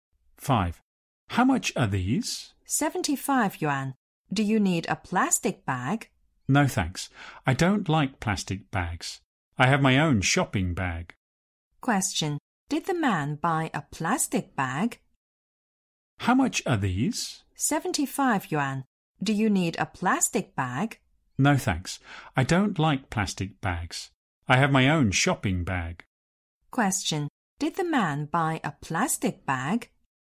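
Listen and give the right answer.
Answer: No, he didn't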